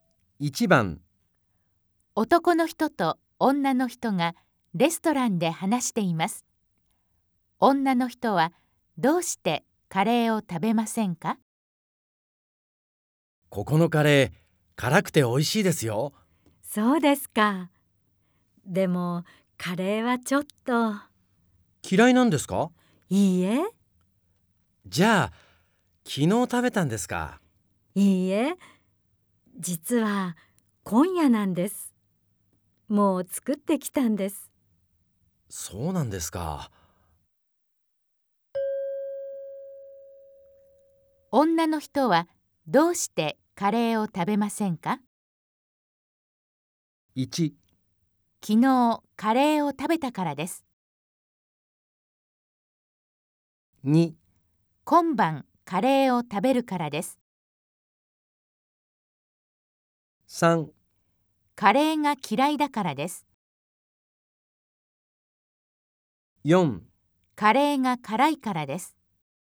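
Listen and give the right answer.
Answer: 2: 今晩カレーを食べるからです。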